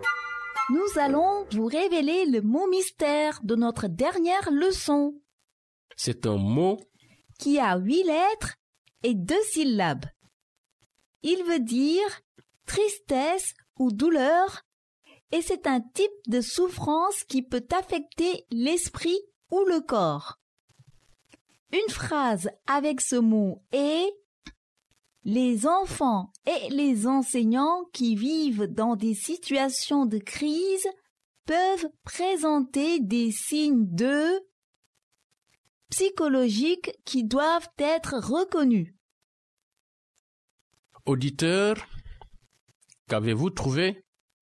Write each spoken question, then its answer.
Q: Auditeur, qu'avez-vous trouvé?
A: Le mot mystère d'aujourd'hui est détresse.